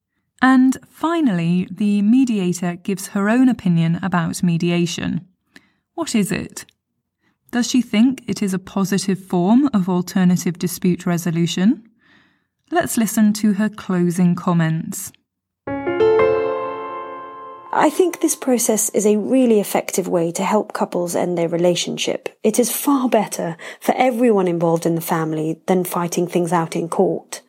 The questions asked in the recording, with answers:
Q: Does she think it is a positive form of alternative dispute resolution?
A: So, yes, she thinks mediation is effective.